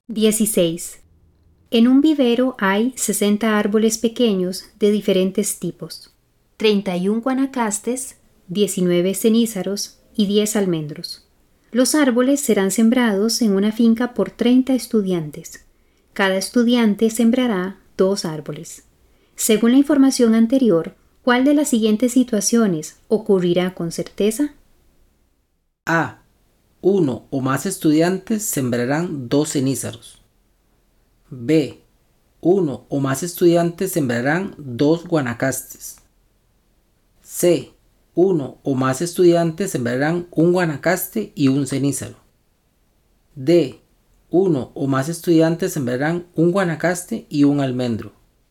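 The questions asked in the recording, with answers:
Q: Según la información anterior, ¿cuál de las siguientes situaciones ocurrirá con certeza?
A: B: Uno o más estudiantes sembrarán 2 guanacastes.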